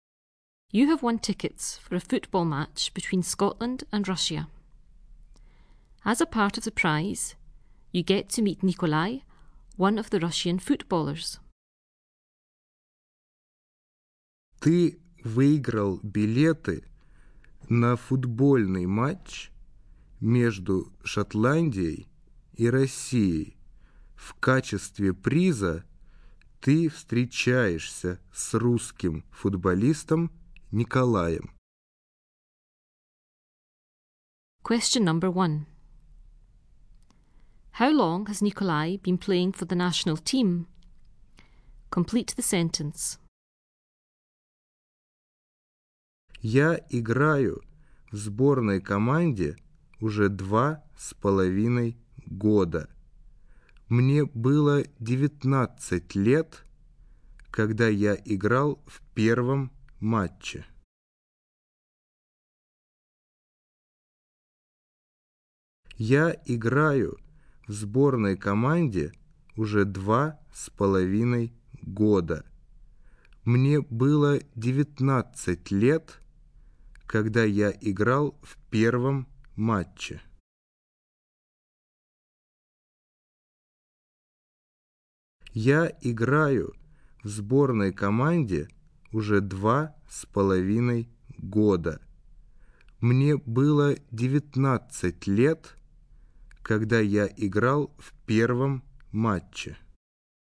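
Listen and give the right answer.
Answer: For two and a half years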